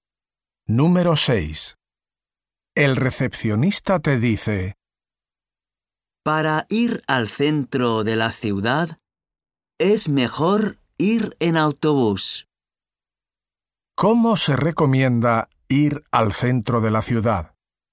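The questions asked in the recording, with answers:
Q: ¿Cómo se recomienda ir al centro de la ciudad?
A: En autobús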